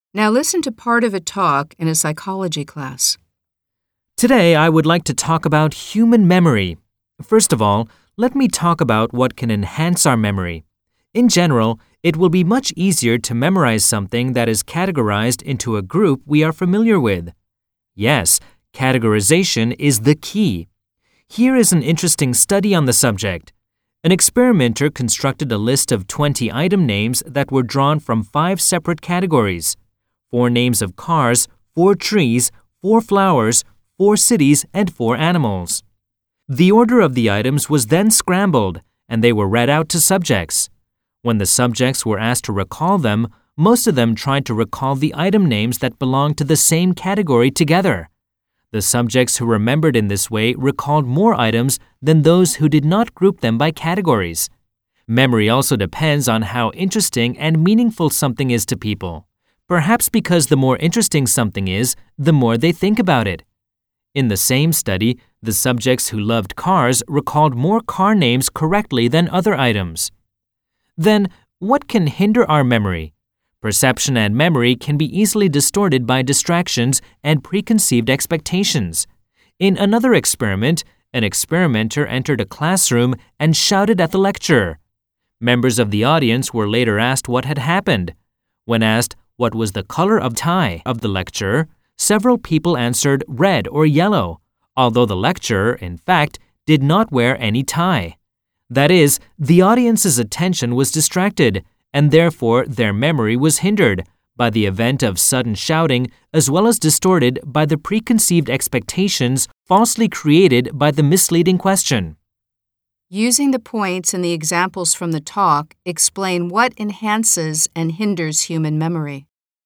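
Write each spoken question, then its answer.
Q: Using the points and the examples from the talk, explain what enhances and hinders human memory.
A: Memory is helped by sorting things into familiar categories and by interest in the material. In one study, people who grouped 20 mixed items by category recalled more, and car lovers recalled more car names. Memory is hurt by distractions and expectations. When someone shouted at a lecturer, people later said his tie was red or yellow, although he wore no tie.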